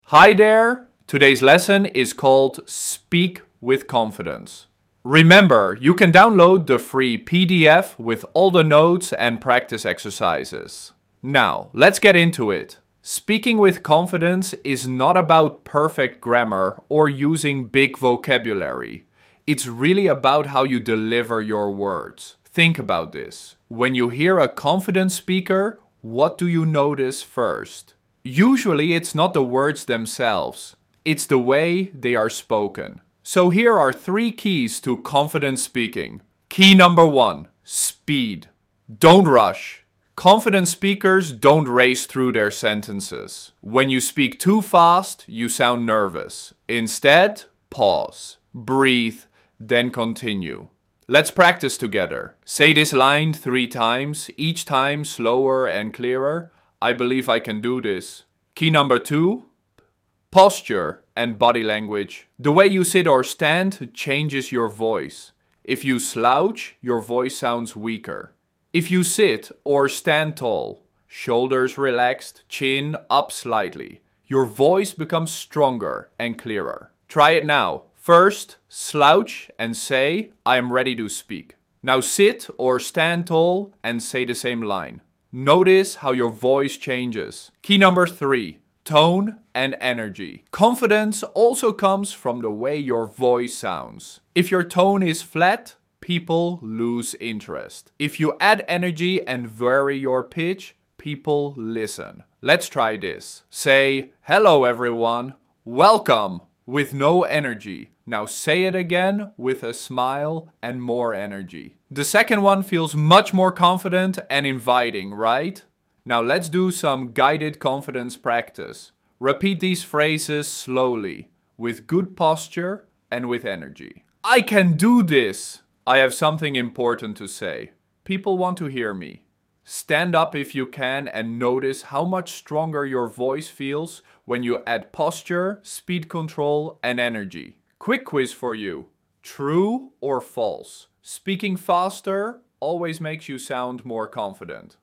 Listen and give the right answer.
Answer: The answer is false.